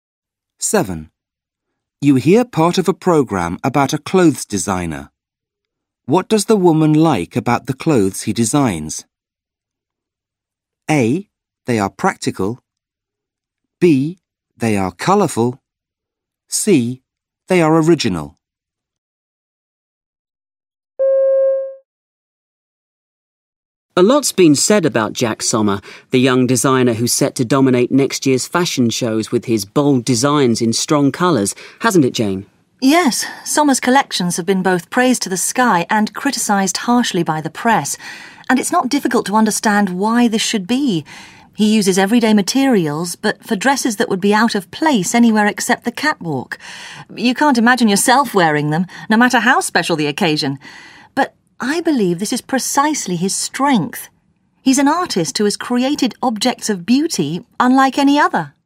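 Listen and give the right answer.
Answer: C: They are original.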